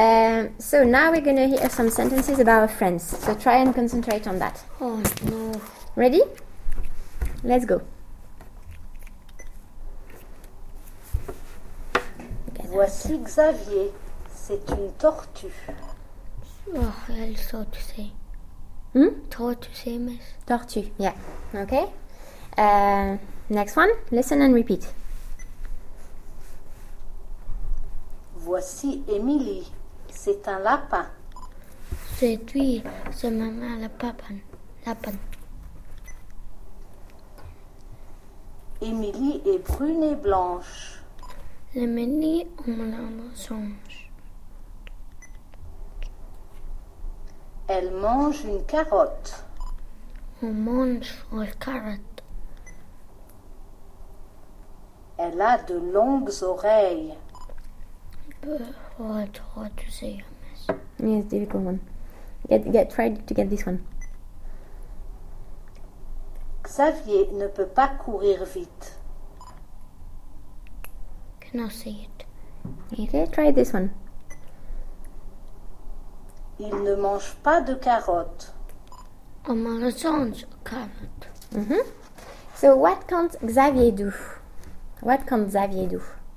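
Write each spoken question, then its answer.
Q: So what can't Xavier do?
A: Run fast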